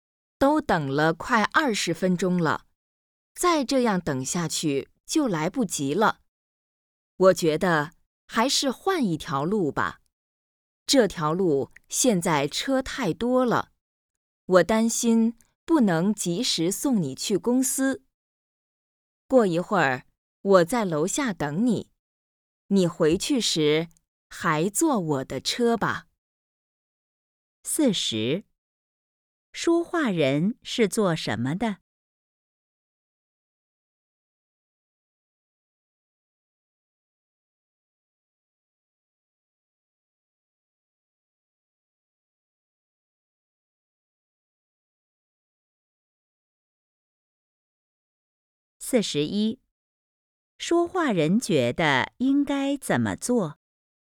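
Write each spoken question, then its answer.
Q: 说话人觉得应该怎么做?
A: 换一条路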